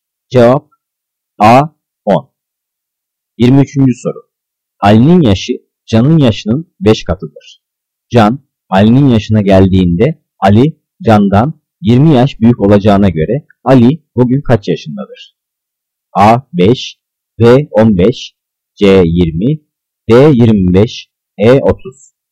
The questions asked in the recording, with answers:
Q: Can Ali'nin yaşına geldiğinde Ali Can'dan 20 yaş büyük olacağına göre Ali bugün kaç yaşındadır?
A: Cevap D 25.